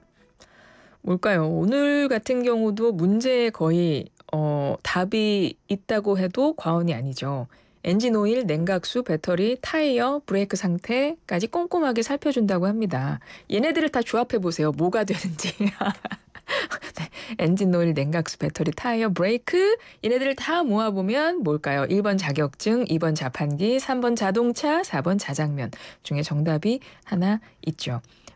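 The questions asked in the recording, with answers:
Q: 얘네들을 다 모아보면 뭘까요? 1번 자격증, 2번 자판기, 3번 자동차, 4번 자장면 중에 정답이 하나 있죠.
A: 3: 자동차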